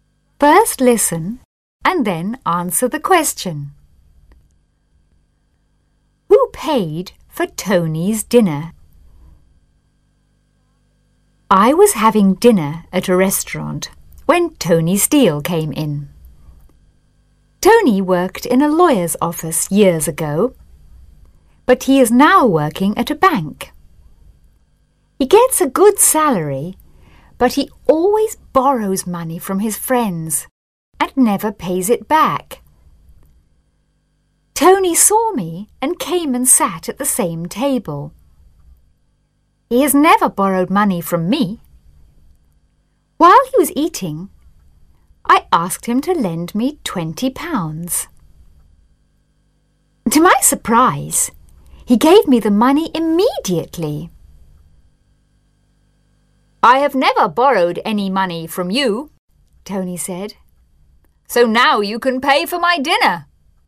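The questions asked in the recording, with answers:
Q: Who paid for Tony's dinner?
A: The writer (the narrator) paid for it.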